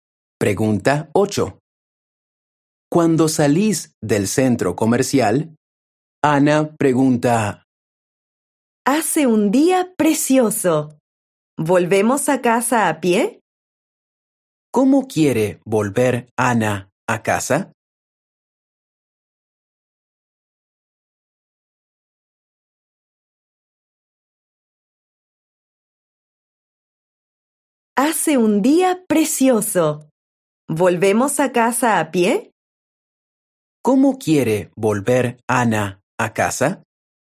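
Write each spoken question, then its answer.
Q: ¿Cómo quiere volver Ana a casa?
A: A pie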